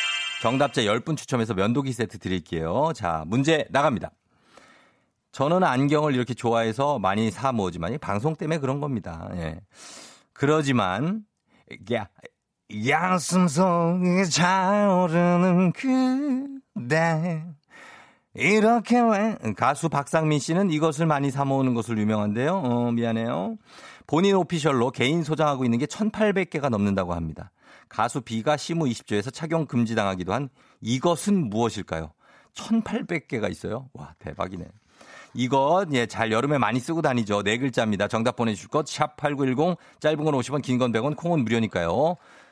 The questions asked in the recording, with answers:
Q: 가수 비가 시무 20조에서 착용 금지당하기도 한 이것은 무엇일까요?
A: 정답은 두구두구두구두구두구두구두구 바로 선글라스 되겠습니다.